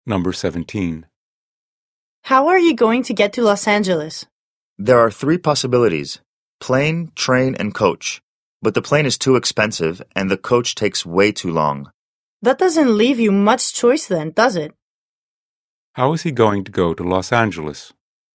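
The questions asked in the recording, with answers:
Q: How is he going to go to Los Angeles?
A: By train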